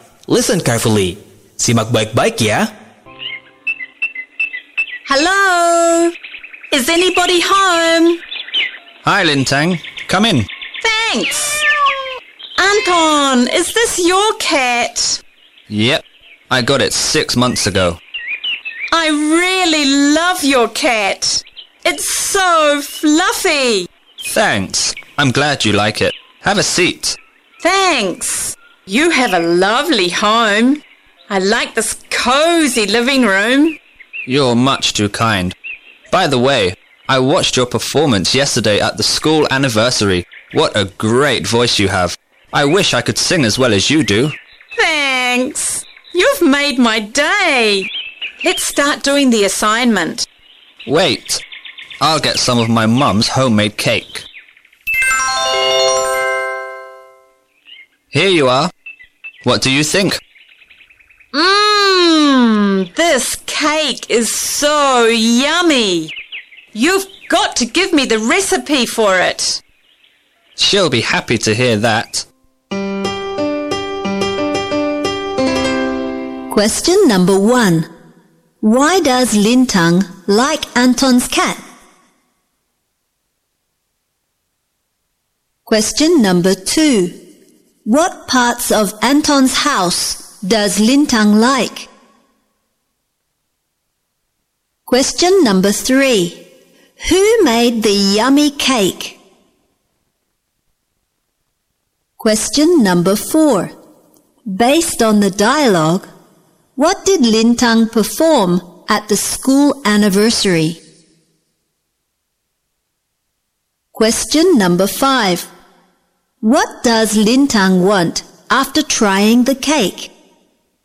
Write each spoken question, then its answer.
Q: Why does Lintang like Anton's cat?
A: Because the cat is so fluffy.

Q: What parts of Anton's house does Lintang like?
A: It's cozy living room.

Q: Who made the yummy cake?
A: Anton's mother.

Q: What does Lintang want after trying the cake?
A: She wants Anton to give her the recipe for his mother's cake.